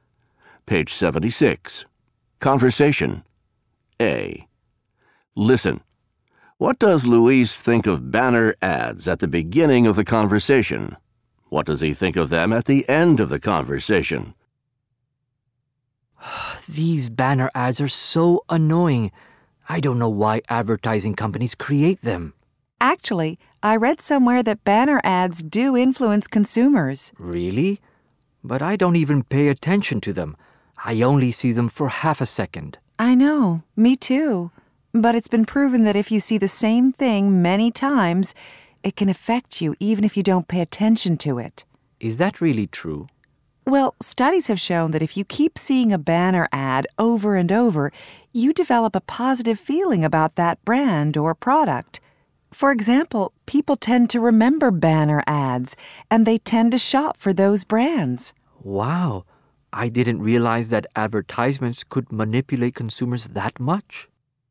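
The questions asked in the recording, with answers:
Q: What does Luis think of banner ads at the beginning of the conversation?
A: He thinks they are annoying and doesn't pay attention to them.

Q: What does he think of them at the end of the conversation?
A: He realizes they can influence or manipulate consumers.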